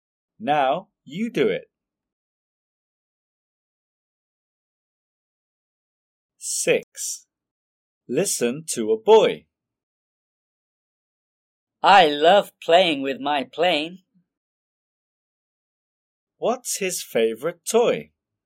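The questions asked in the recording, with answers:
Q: What's his favorite toy?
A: his plane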